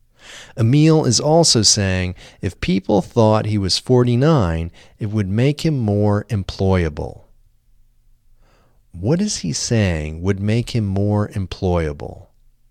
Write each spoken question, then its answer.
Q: What is he saying would make him more employable?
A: He is saying if people thought he was 49, it would make him more employable.